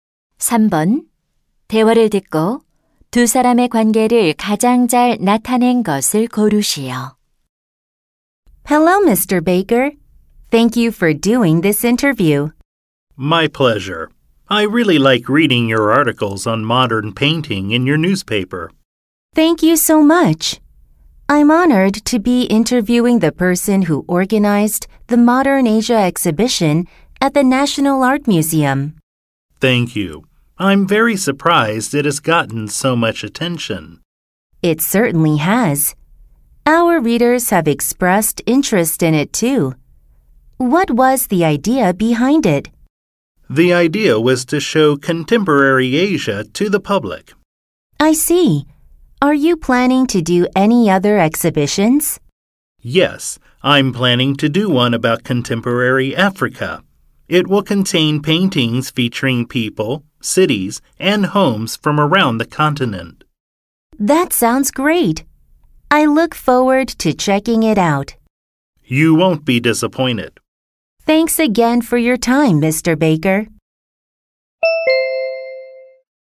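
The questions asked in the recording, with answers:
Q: 대화를 듣고 두 사람의 관계를 가장 잘 나타낸 것을 고르시오.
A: 신문 기자 - 전시 기획자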